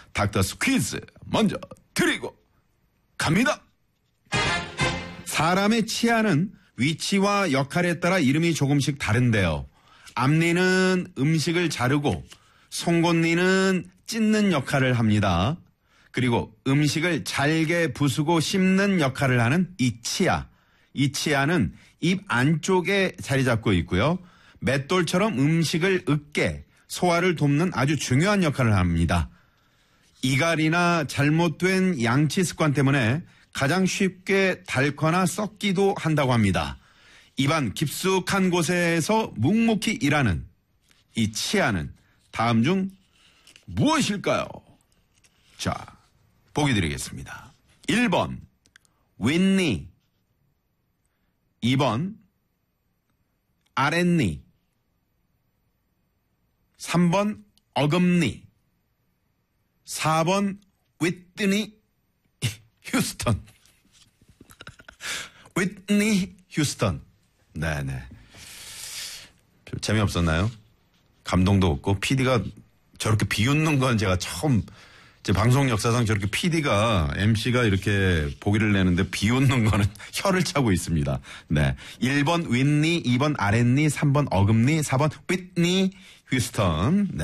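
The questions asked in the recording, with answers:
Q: 입안 깊숙한 곳에서 묵묵히 일하는 이 치아는 다음 중 무엇일까요?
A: 3: 어금니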